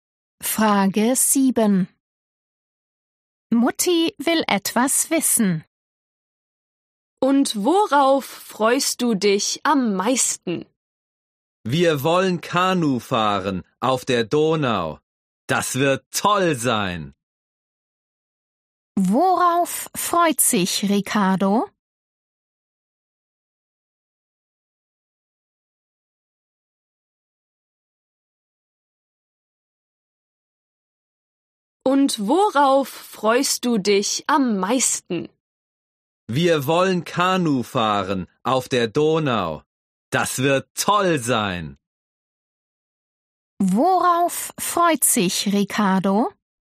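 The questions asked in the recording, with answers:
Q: Worauf freut sich Ricardo?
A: auf Kanufahren auf der Donau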